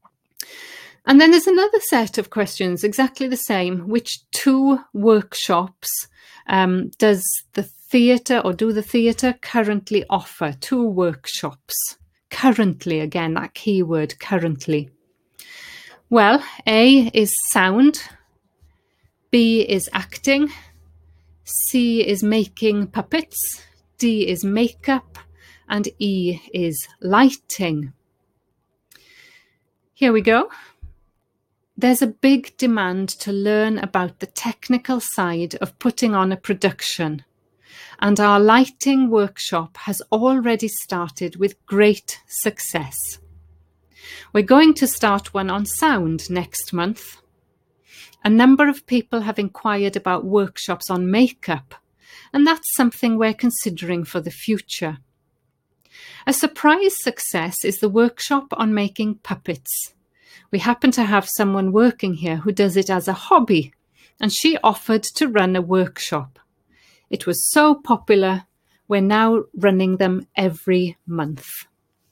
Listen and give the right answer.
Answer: So the first answer is E, lighting.